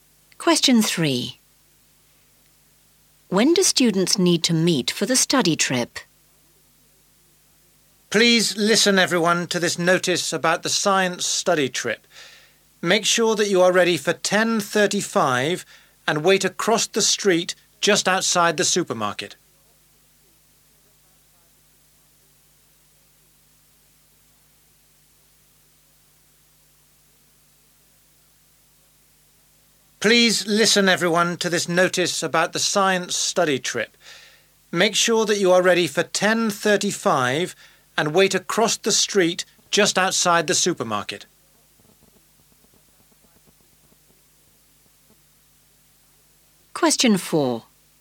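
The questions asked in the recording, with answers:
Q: When do students need to meet for the study trip?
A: 10:35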